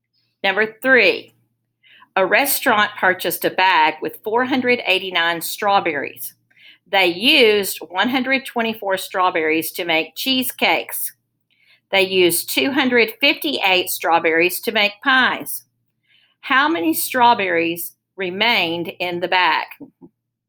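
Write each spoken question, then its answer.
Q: How many strawberries remained in the bag?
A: 107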